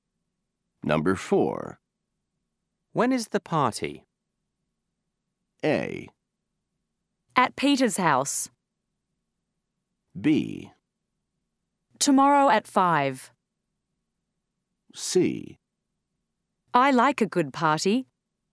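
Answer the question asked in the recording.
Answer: B: Tomorrow at 5.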